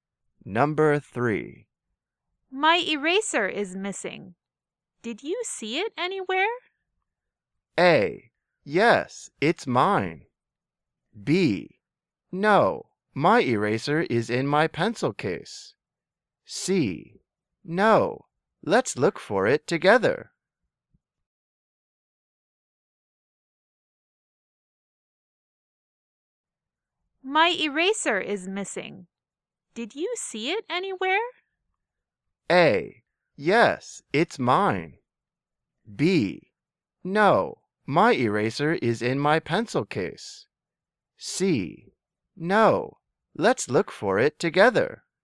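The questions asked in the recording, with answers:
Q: My eraser is missing. Did you see it anywhere?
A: C: No, let's look for it together.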